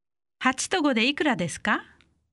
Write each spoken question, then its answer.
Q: 8と5でいくらですか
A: 13